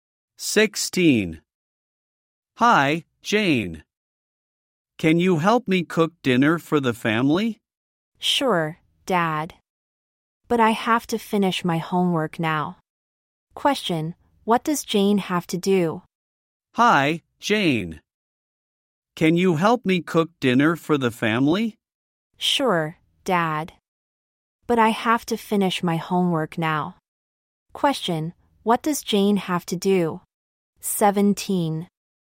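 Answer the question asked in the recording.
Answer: Finish her homework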